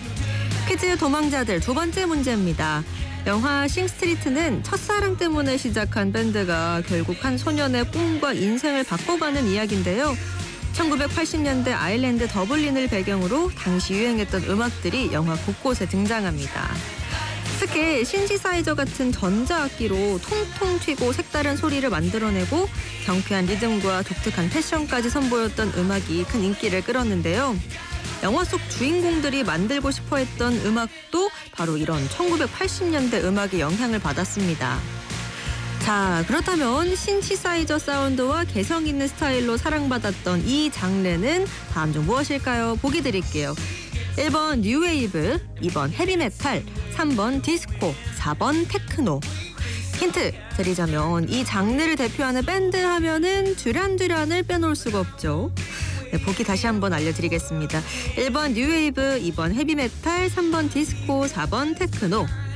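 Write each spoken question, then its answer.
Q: 자, 그렇다면 신시사이저 사운드와 개성 있는 스타일로 사랑받았던 이 장르는 다음 중 무엇일까요?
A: 1: 뉴웨이브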